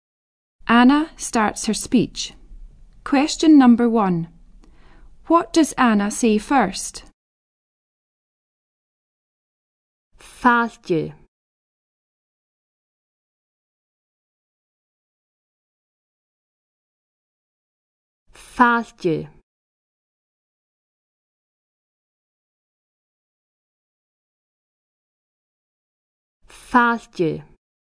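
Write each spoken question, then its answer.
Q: What does Anna say first?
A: Welcome (Fàilte)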